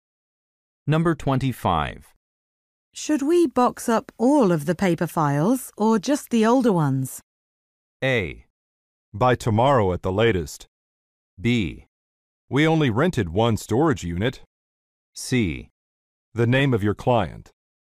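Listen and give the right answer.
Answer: B: We only rented one storage unit.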